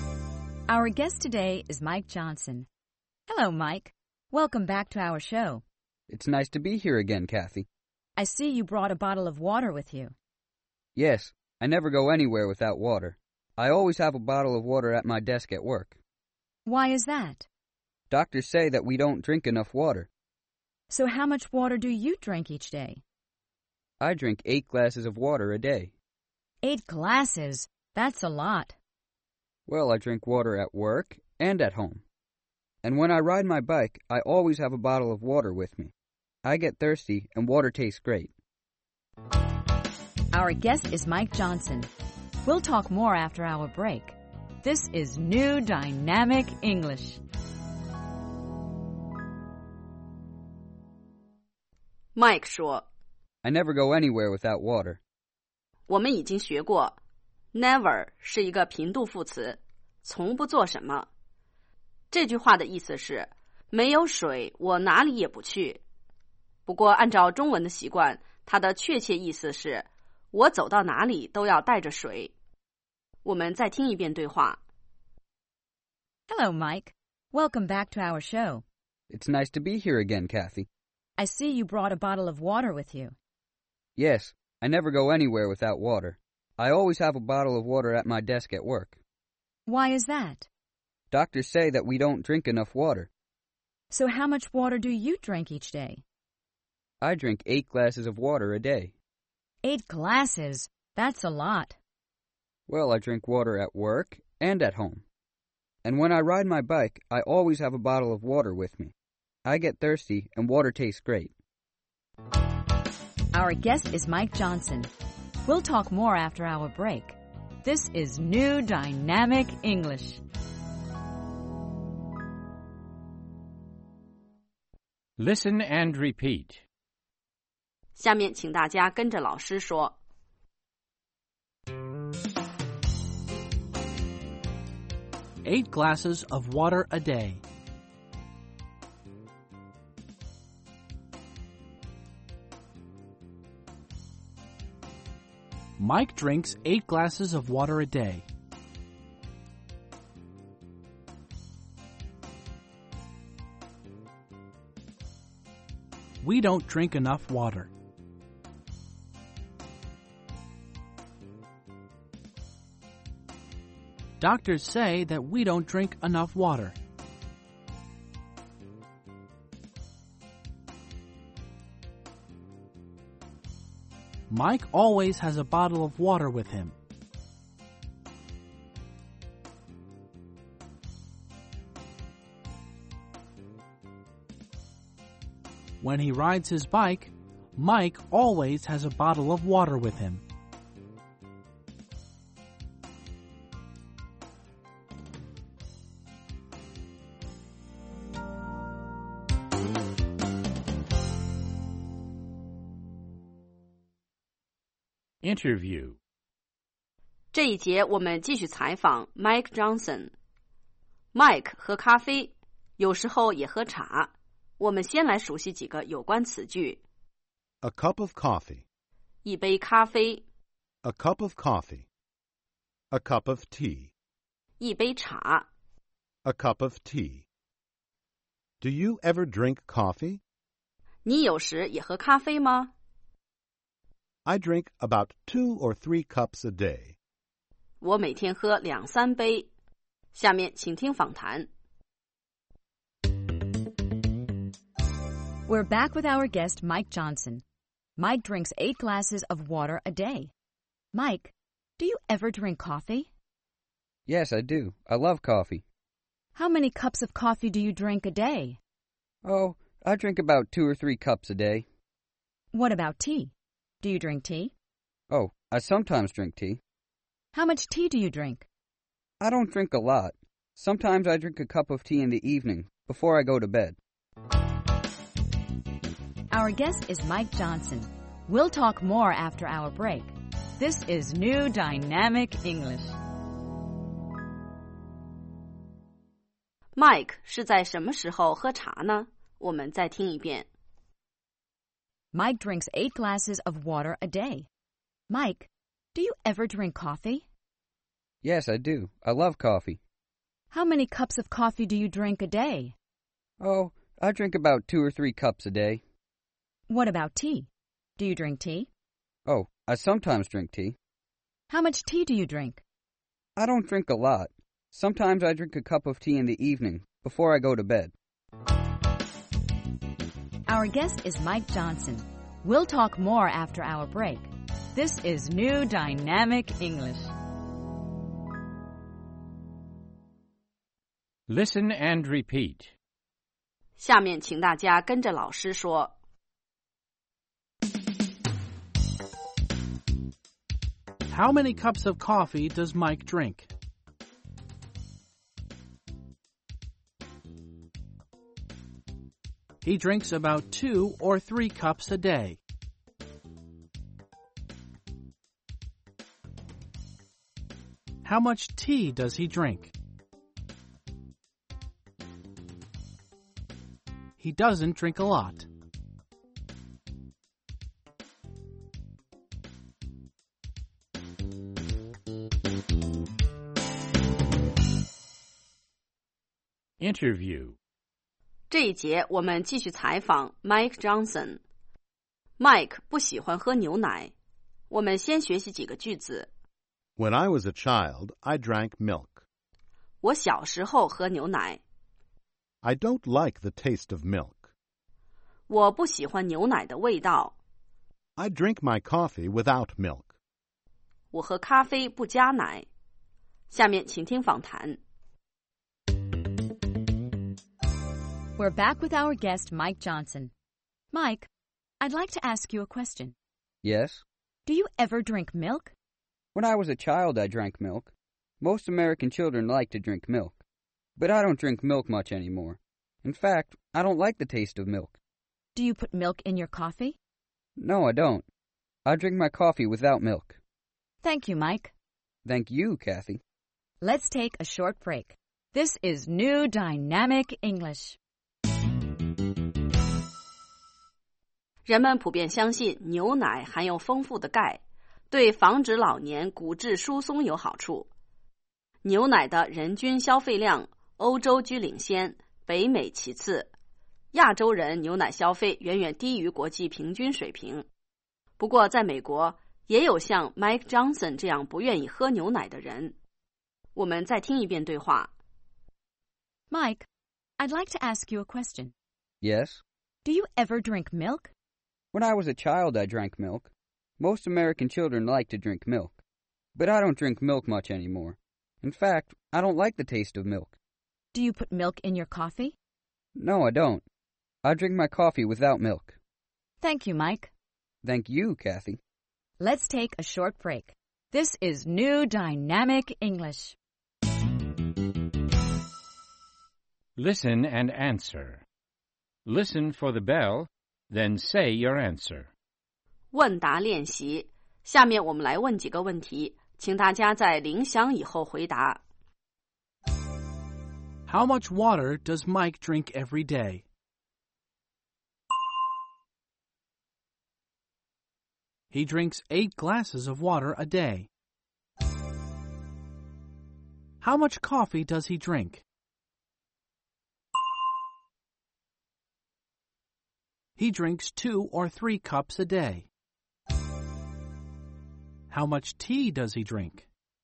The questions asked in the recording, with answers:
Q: How much water does Mike drink every day?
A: He drinks 8 glasses of water a day.

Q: How much tea does he drink?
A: He doesn't drink a lot.